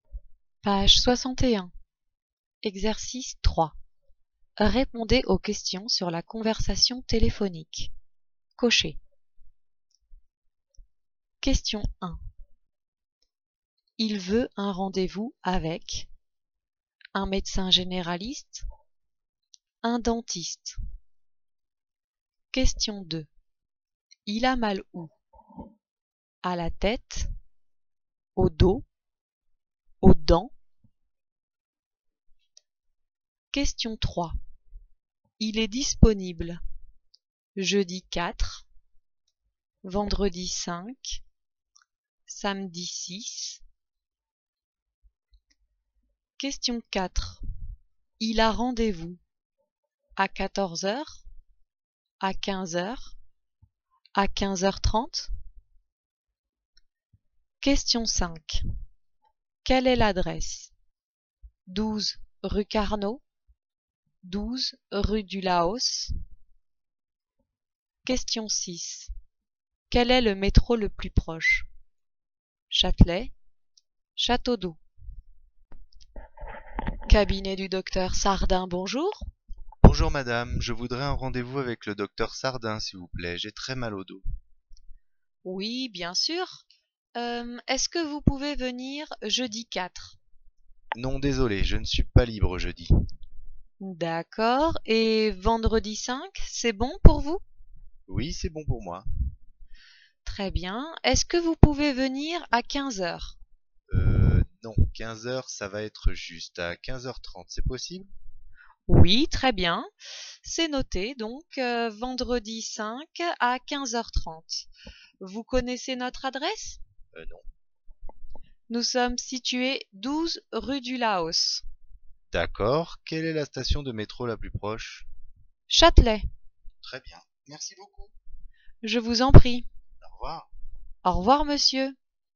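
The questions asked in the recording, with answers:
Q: Il a mal où? À la tête, au dos, aux dents.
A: au dos

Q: Il est disponible jeudi 4, vendredi 5, samedi 6.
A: vendredi 5

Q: Il a rendez-vous à 14h, à 15h, à 15h30.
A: à 15h30

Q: Quelle est l'adresse?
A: 12 rue du Laos

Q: Quel est le métro le plus proche?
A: Châtelet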